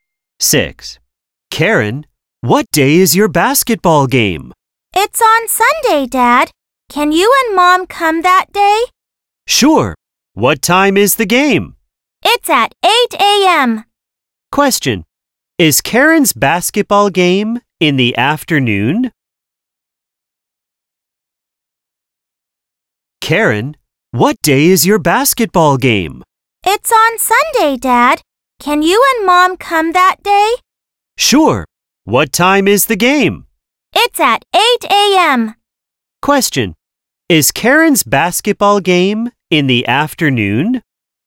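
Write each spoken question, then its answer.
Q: Is Karen's basketball game in the afternoon?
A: No, it is at 8 a.m.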